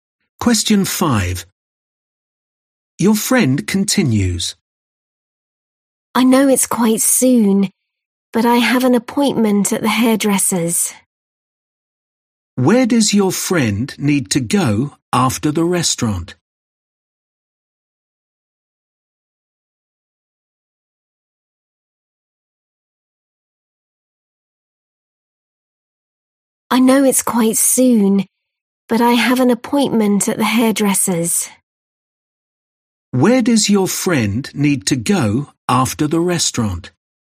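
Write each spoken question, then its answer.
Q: Where does your friend need to go after the restaurant?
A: The hairdresser's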